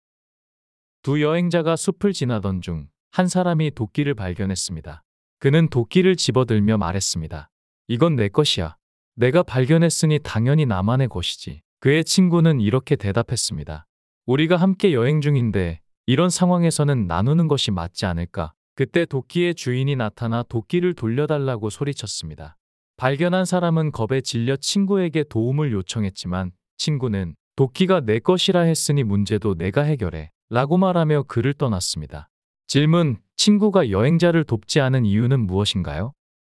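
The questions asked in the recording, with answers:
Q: 친구가 여행자를 돕지 않은 이유는 무엇인가요?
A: 여행자가 도끼를 나누지 않고 자기 것이라고 했기 때문에 문제도 혼자 해결해야 한다고 생각해서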